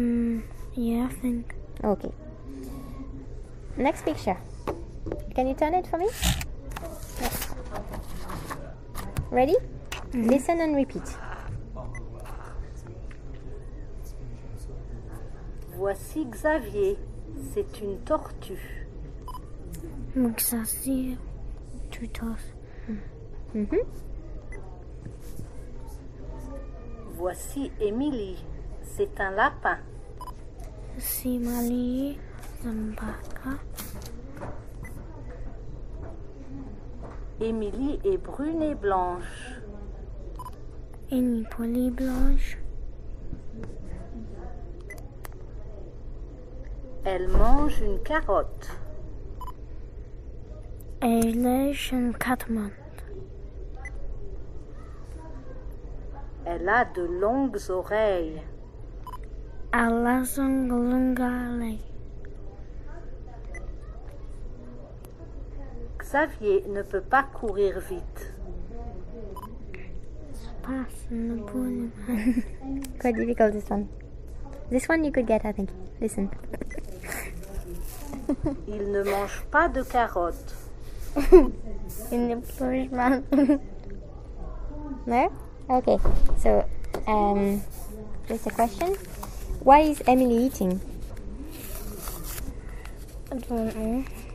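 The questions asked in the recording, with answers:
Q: Why is Emily eating?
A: A carrot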